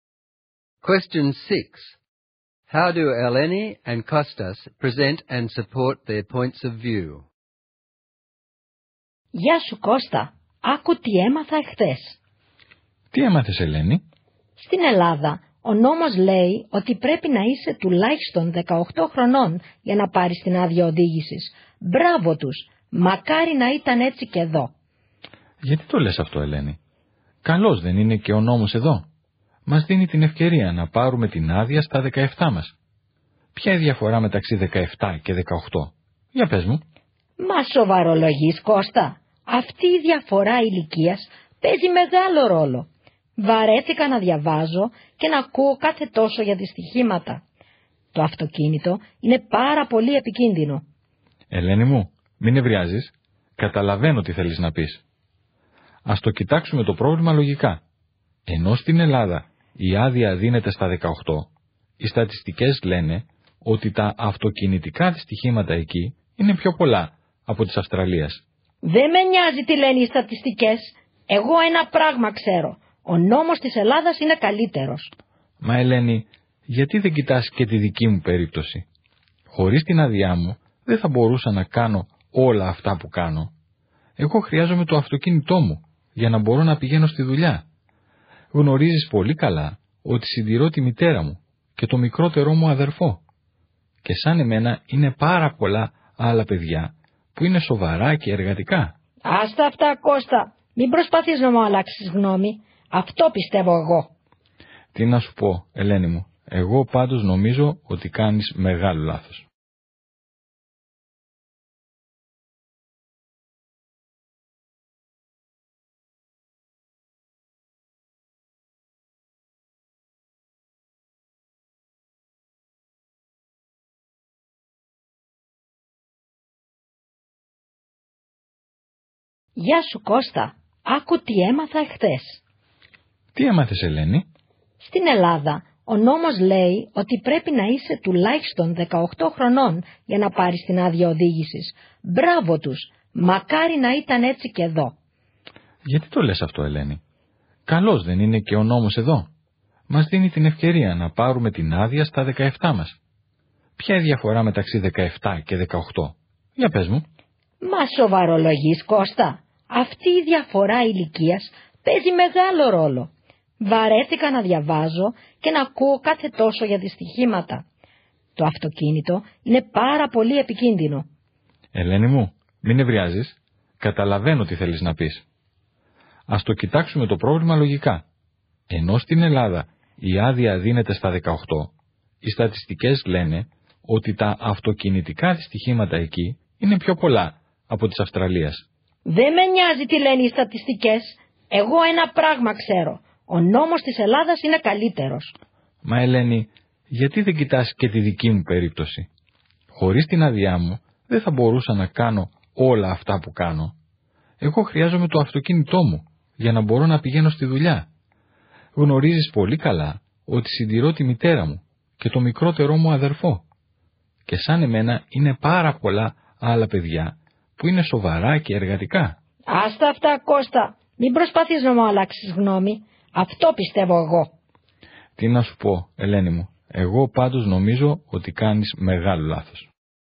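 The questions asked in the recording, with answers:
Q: How do Eleni and Kostas present and support their points of view?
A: Eleni argues from emotion and will not listen: she talks about accidents and says she does not care about statistics. Kostas argues logically: he cites statistics showing Greece has more accidents and gives his own case, needing the car for work to support his family.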